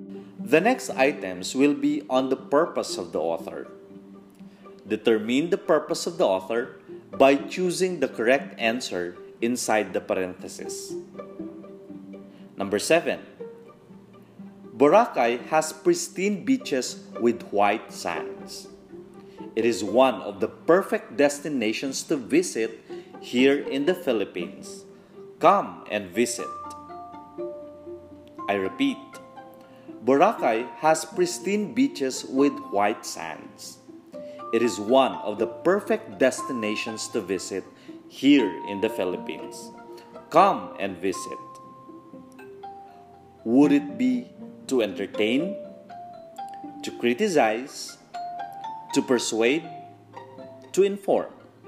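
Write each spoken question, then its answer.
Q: Would it be to entertain, to criticize, to persuade, to inform.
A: to persuade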